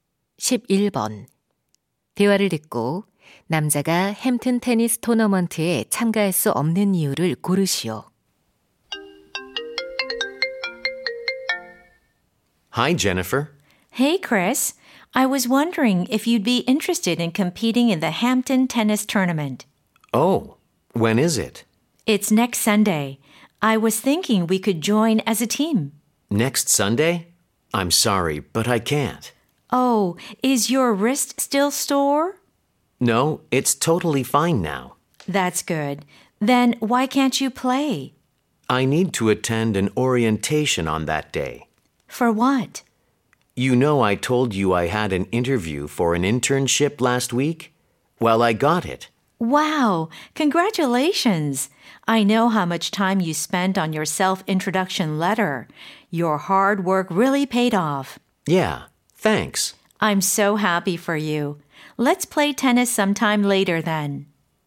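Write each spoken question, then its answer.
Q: 대화를 듣고 남자가 햄튼 테니스 토너먼트에 참가할 수 없는 이유를 고르시오.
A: 인턴십 오리엔테이션에 참석해야 해서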